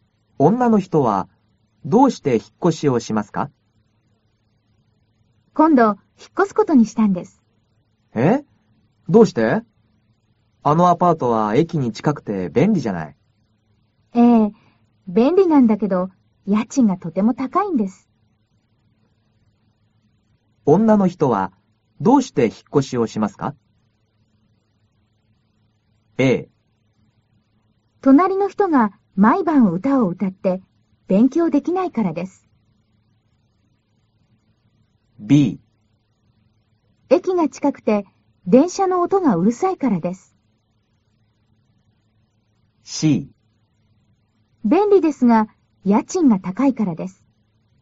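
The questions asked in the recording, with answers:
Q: 女の人は、どうして引っ越しをしますか?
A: C: 便利ですが家賃が高いからです。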